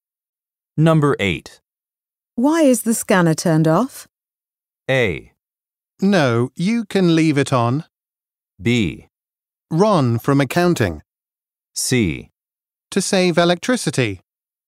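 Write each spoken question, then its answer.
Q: Why is the scanner turned off?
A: C: To save electricity.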